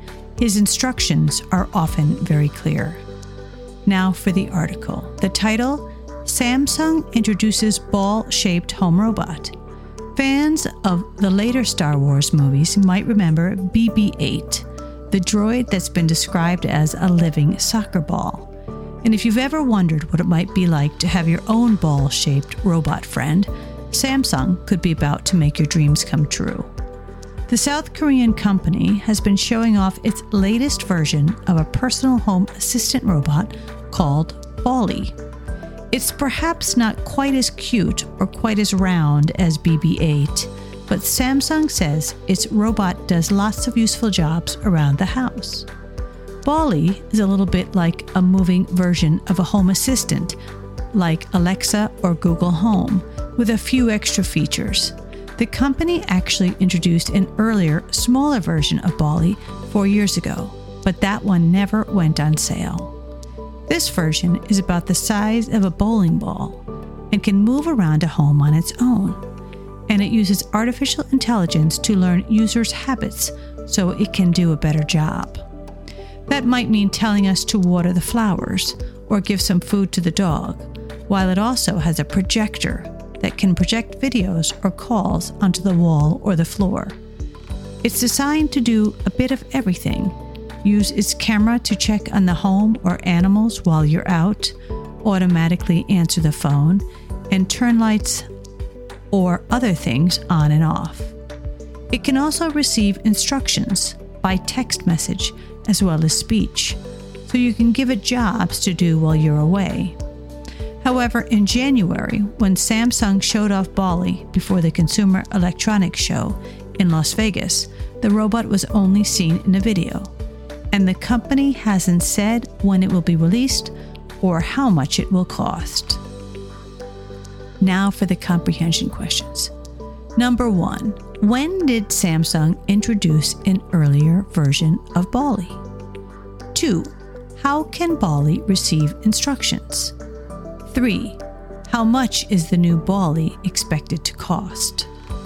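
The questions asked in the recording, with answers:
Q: when did Samsung introduce an earlier version of Bally?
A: 4 years ago

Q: how can Bally receive instructions?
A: By text message as well as speech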